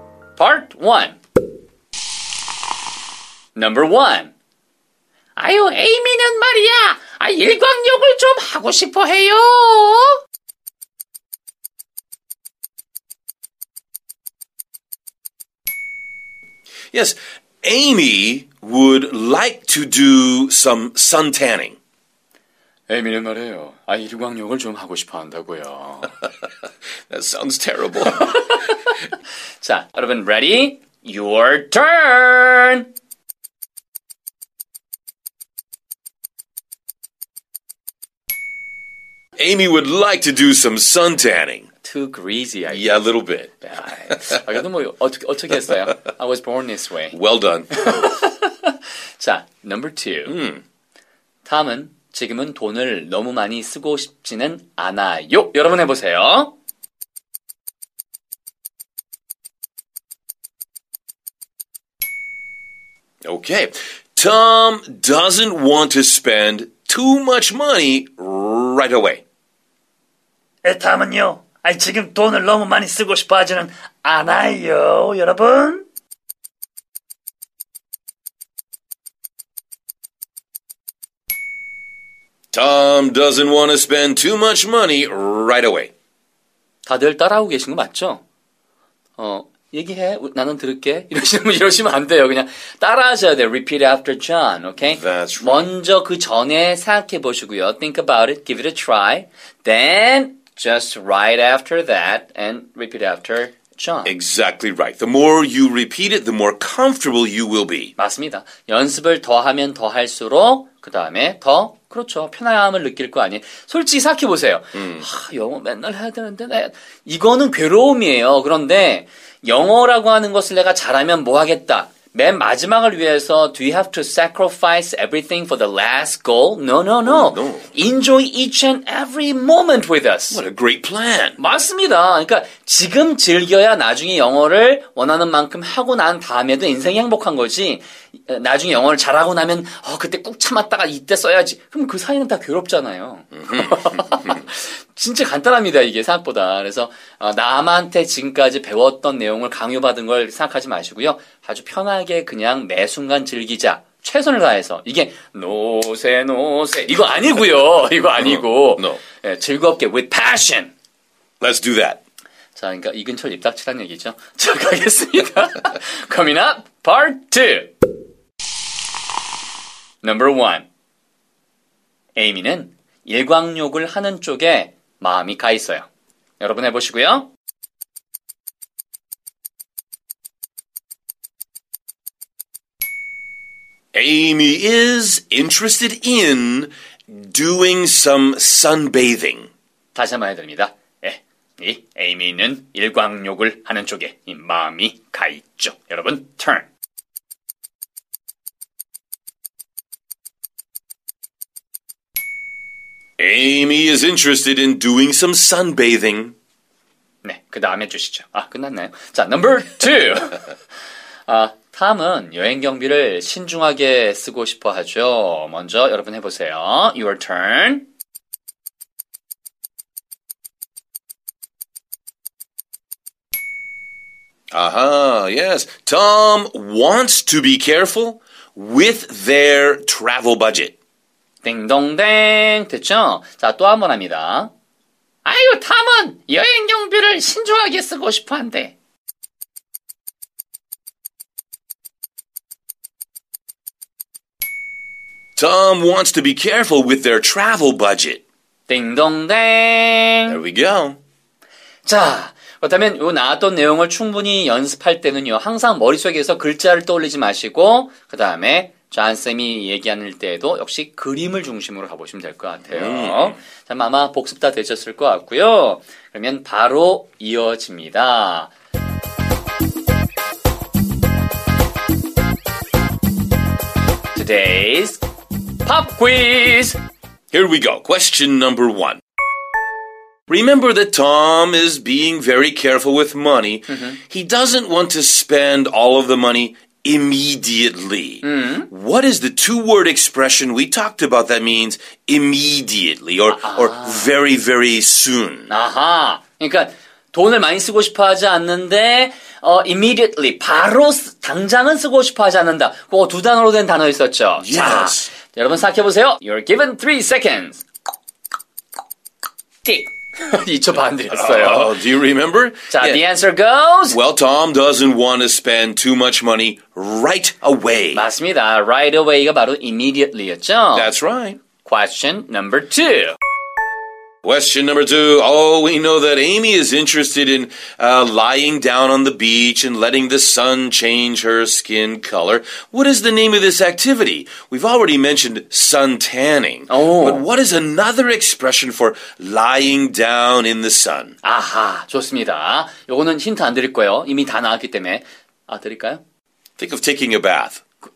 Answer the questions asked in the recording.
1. Well, Tom doesn't want to spend too much money right away.
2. Amy is interested in doing some sunbathing.